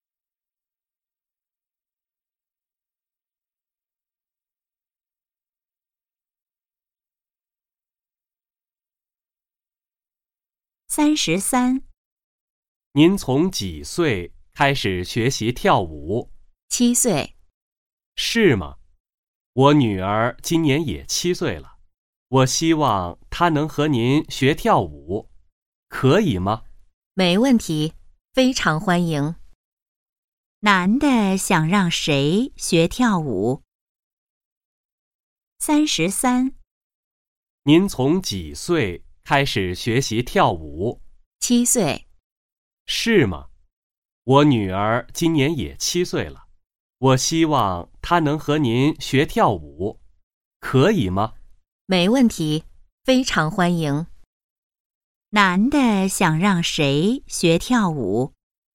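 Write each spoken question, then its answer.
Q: 男的想让谁学跳舞?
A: 他的女儿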